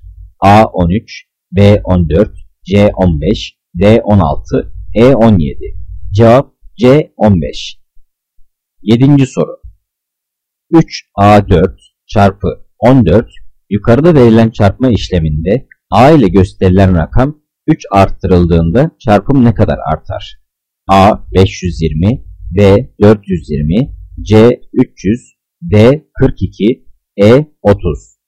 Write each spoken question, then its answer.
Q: 3A 4 çarpı 14 yukarıda verilen çarpma işleminde A ile gösterilen rakam 3 arttırıldığında çarpım ne kadar artar?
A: Cevap B 420.